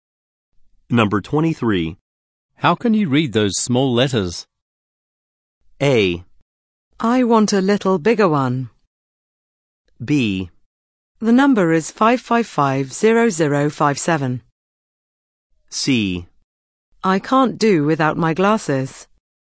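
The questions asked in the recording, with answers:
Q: How can you read those small letters?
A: C: I can't do without my glasses.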